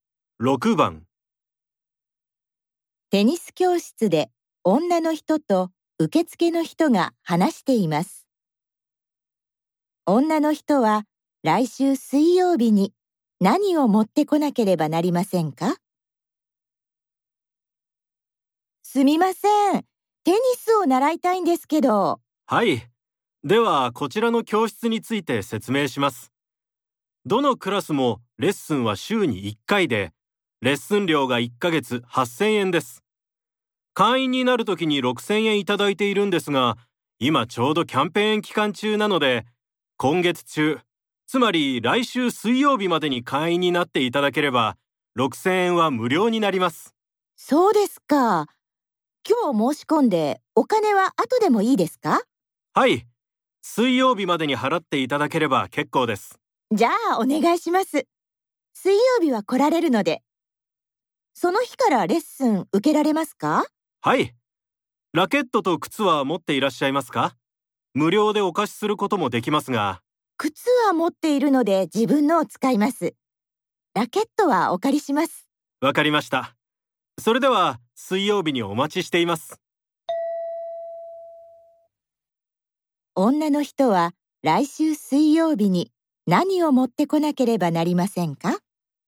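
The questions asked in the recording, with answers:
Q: 女の人は来週水曜日に何を持ってこなければなりませんか?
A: レッスン料8000円と靴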